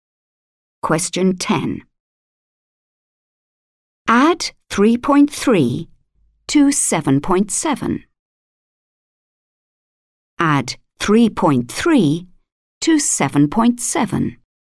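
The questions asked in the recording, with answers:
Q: Add 3.3 to 7.7.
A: 11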